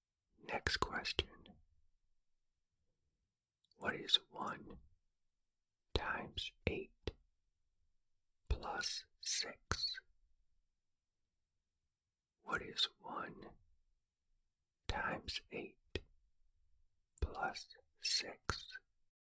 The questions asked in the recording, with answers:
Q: What is 1 times 8 plus 6?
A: The answer is 14.